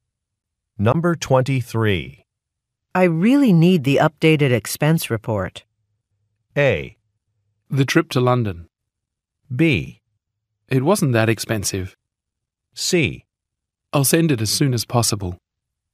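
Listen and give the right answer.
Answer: C: I'll send it as soon as possible.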